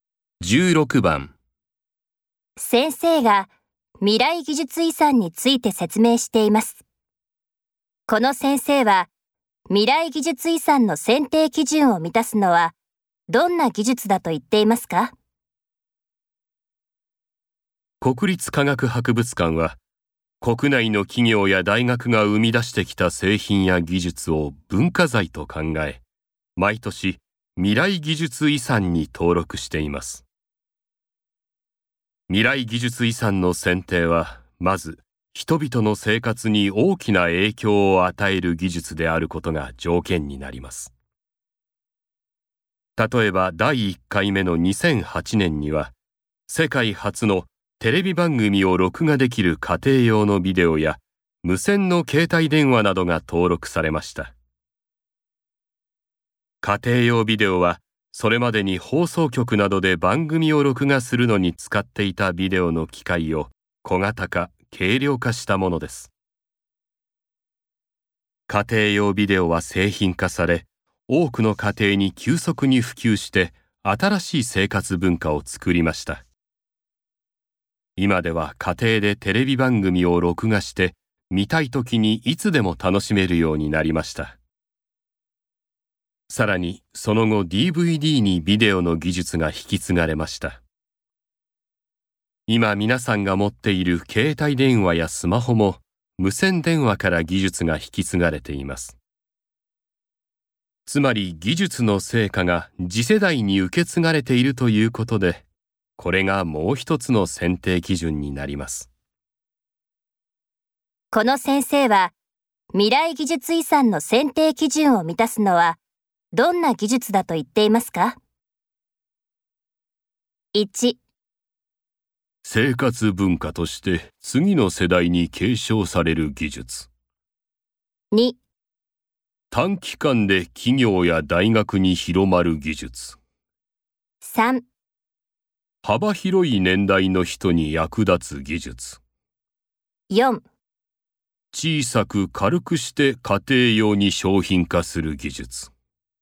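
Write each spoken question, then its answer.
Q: この先生は未来技術遺産の選定基準を満たすのはどんな技術だと言っていますか?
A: 1: 生活文化として次の世代に継承される技術。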